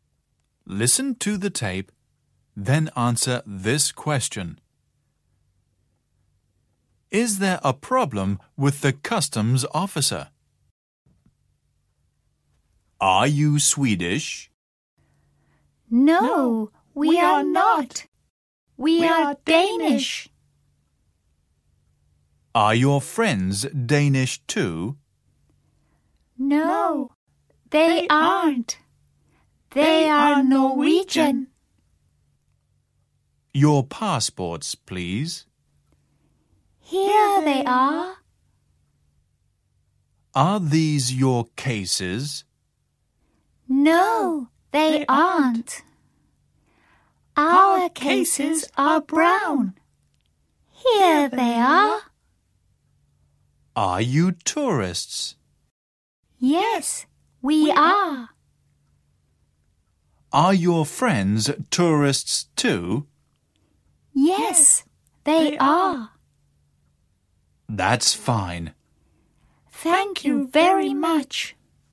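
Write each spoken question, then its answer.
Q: Is there a problem with the customs officer?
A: No, there isn't. Everything is fine.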